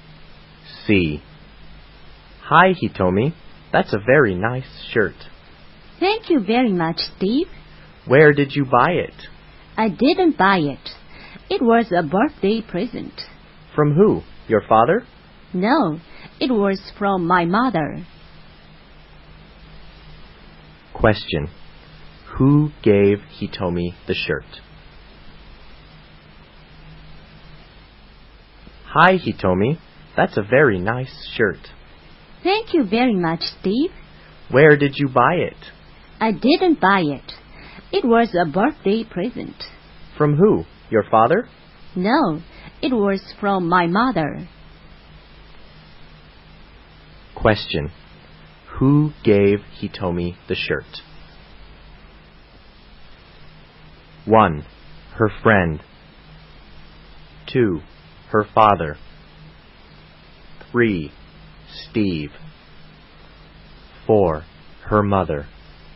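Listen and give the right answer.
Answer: 4: Her mother.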